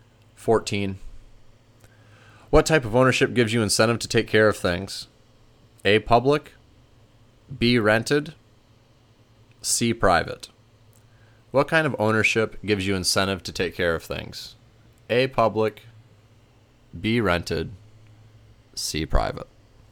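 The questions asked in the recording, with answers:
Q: What type of ownership gives you incentive to take care of things?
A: C: private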